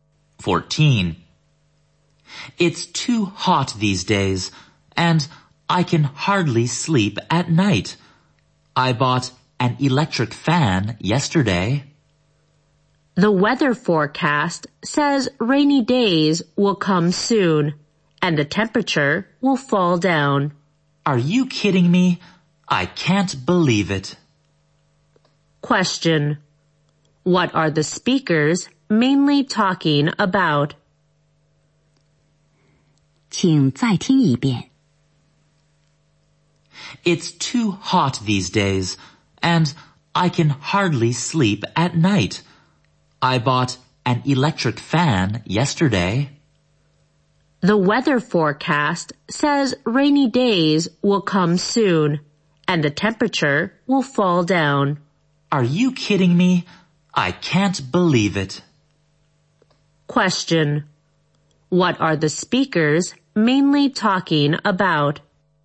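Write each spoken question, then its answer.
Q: Question. What are the speakers mainly talking about?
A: The weather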